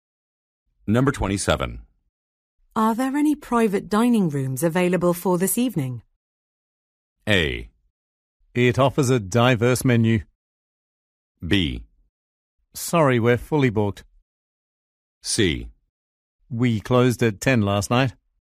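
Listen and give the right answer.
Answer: B: Sorry, we're fully booked.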